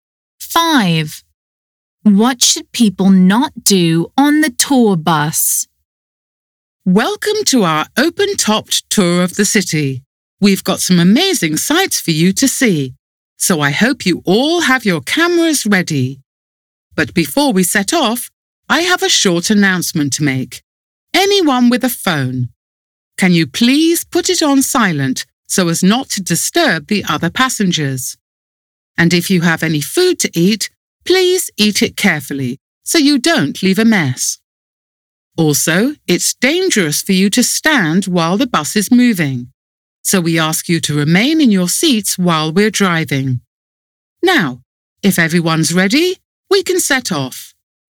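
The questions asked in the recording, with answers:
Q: What should people not do on the tour bus?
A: Stand while the bus is moving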